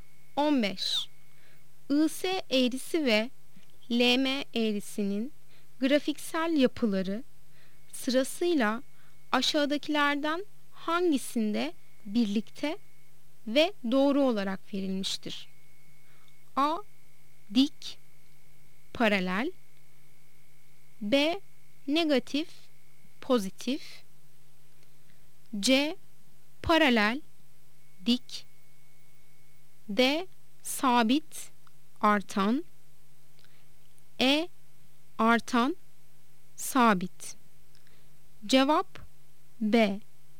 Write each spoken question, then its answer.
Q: IS eğrisi ve LM eğrisinin grafiksel yapıları sırasıyla aşağıdakilerden hangisinde birlikte ve doğru olarak verilmiştir?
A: Cevap B. Negatif, pozitif.